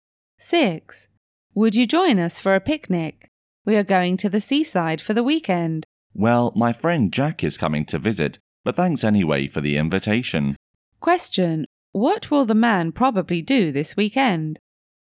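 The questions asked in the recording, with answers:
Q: What will the man probably do this weekend?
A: Stay and spend time with his visiting friend Jack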